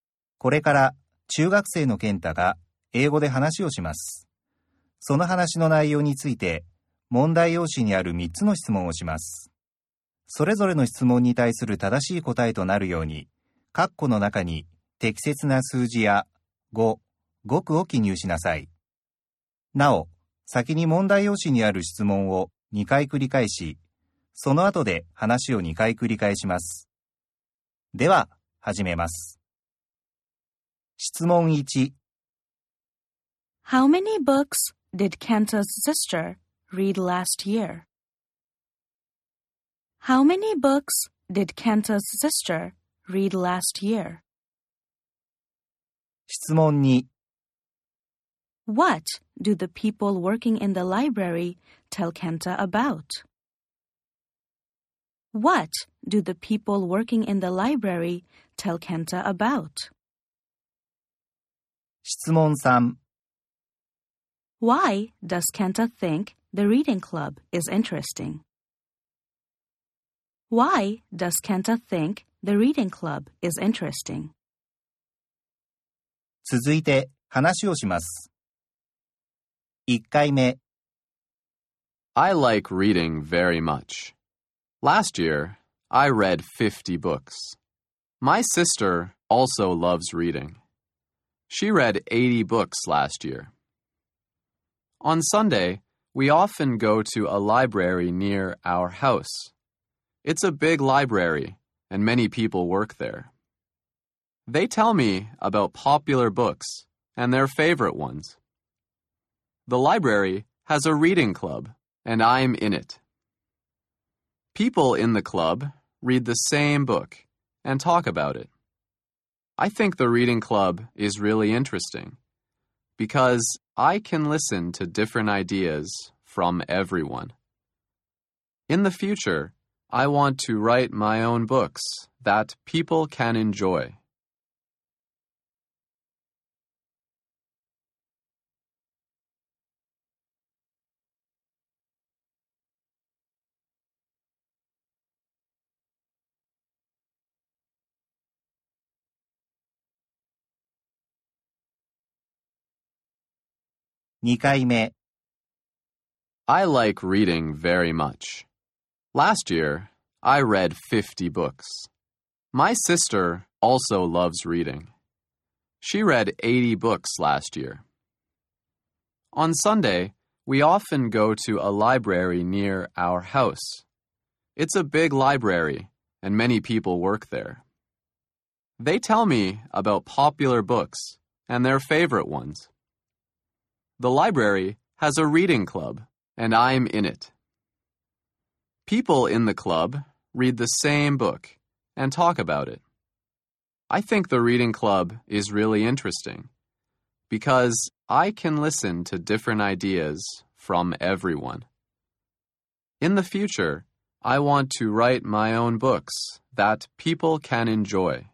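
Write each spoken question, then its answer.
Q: How many books did Kenta's sister read last year?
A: 80 books

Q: What do the people working in the library tell Kenta about?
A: Popular books and their favorite ones

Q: Why does Kenta think the reading club is interesting?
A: Because he can listen to different ideas from everyone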